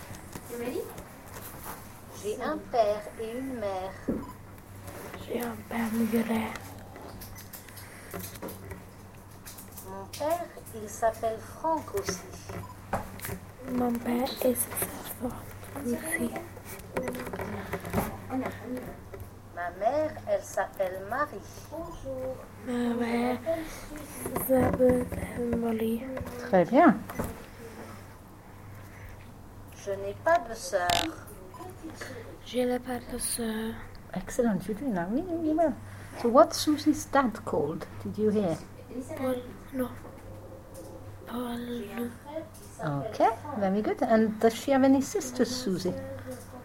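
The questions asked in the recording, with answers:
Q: And does she have any sisters, Susie?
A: No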